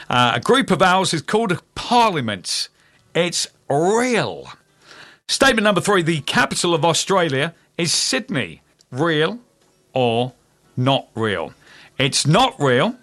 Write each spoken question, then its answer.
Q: Real or not real?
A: It's not real.